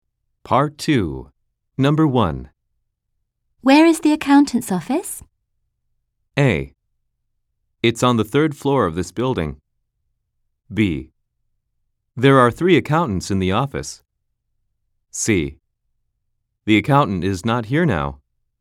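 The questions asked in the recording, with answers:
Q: Where is the accountant's office?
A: A: It's on the third floor of this building.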